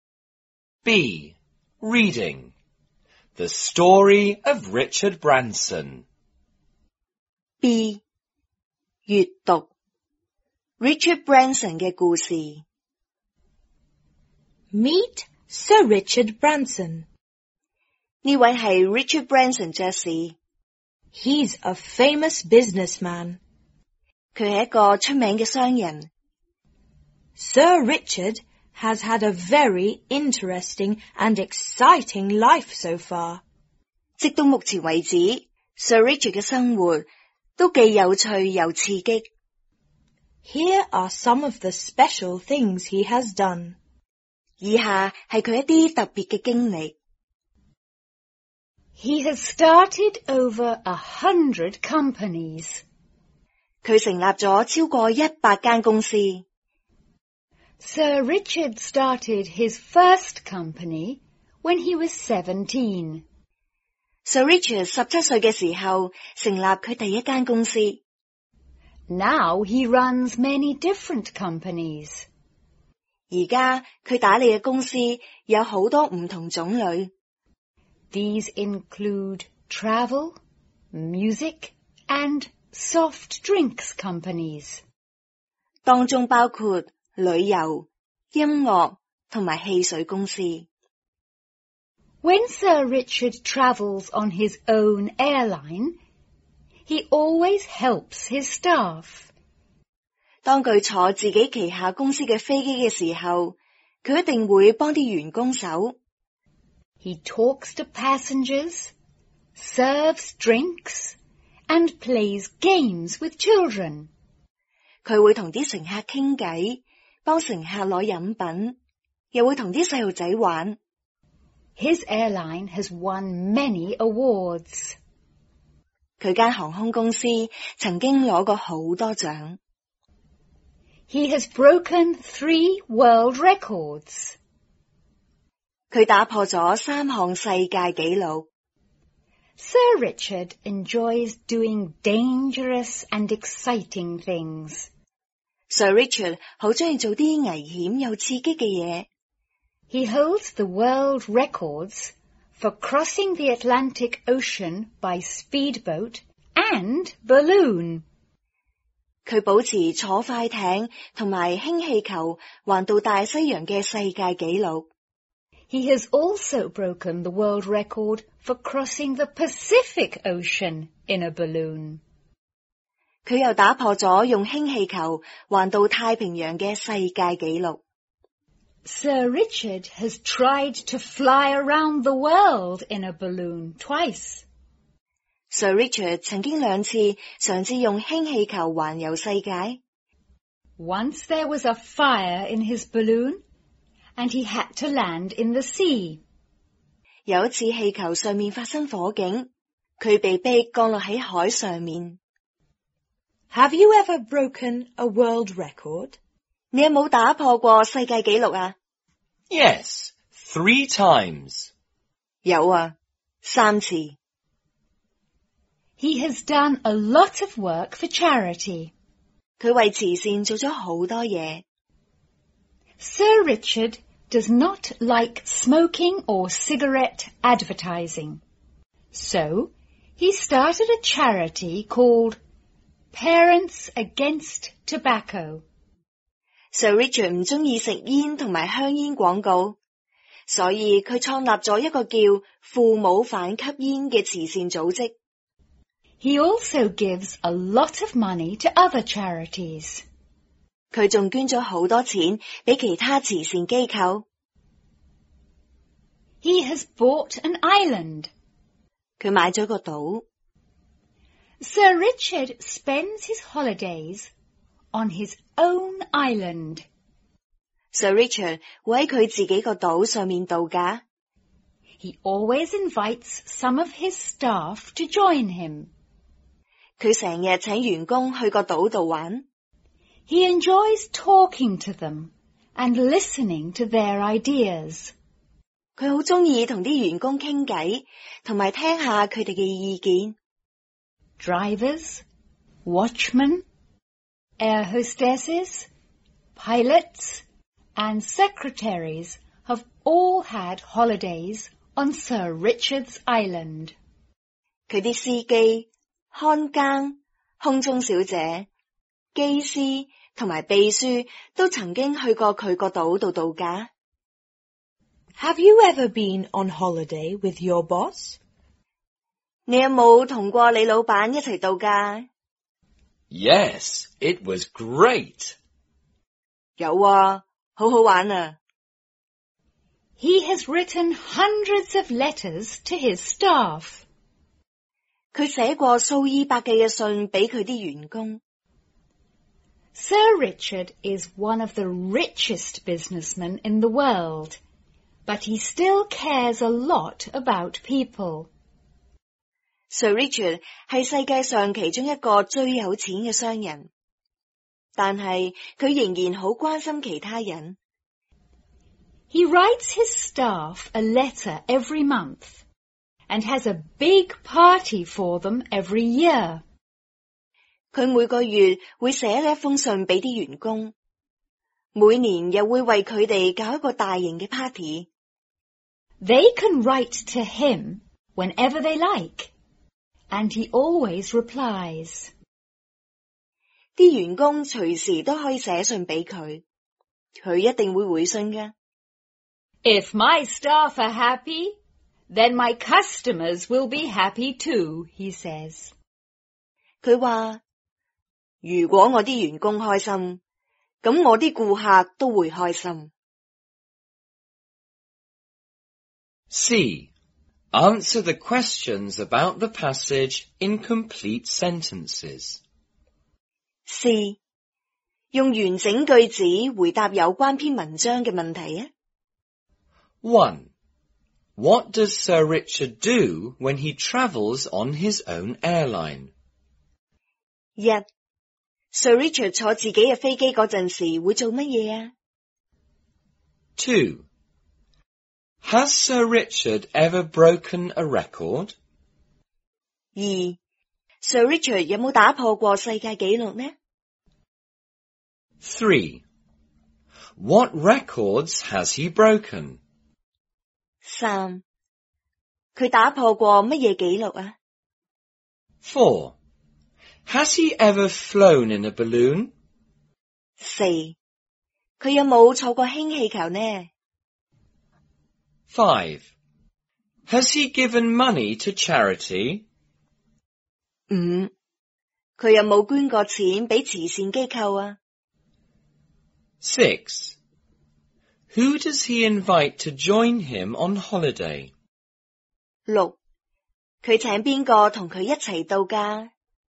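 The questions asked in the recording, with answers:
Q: What does Sir Richard do when he travels on his own airline?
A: He helps his staff: he talks to passengers, serves drinks and plays games with children.

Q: Has Sir Richard ever broken a record?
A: Yes, he has broken 3 world records.

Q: What records has he broken?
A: Crossing the Atlantic Ocean by speedboat and by balloon, and crossing the Pacific Ocean in a balloon.

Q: Has he ever flown in a balloon?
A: Yes, he has.

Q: Has he given money to charity?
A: Yes, he has given a lot of money to charities.

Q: Who does he invite to join him on holiday?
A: He invites some of his staff.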